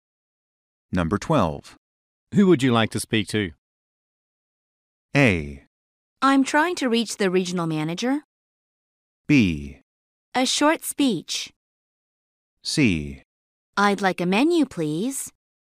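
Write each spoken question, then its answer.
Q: Who would you like to speak to?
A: A: I'm trying to reach the regional manager.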